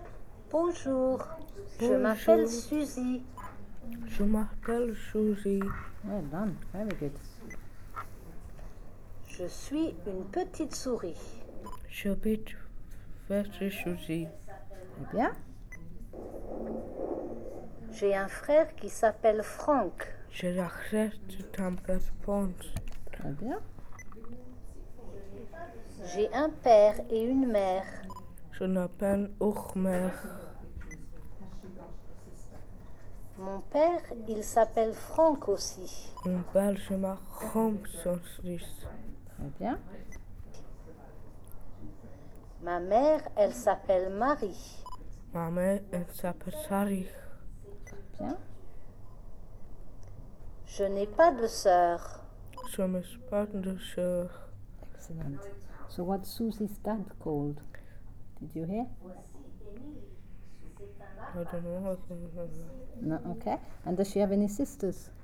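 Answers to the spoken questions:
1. Franck
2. No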